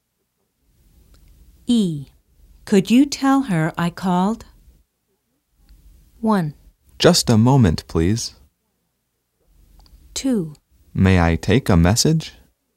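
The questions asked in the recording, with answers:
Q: Could you tell her I called?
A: 2: May I take a message?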